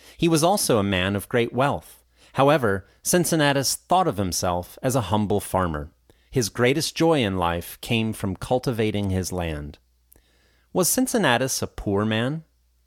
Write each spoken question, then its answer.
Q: Was Cincinnatus a poor man?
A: No, he was a man of great wealth.